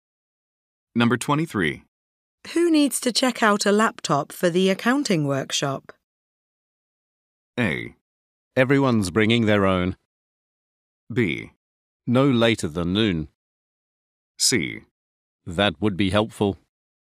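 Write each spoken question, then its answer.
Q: Who needs to check out a laptop for the accounting workshop?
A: A: Everyone's bringing their own.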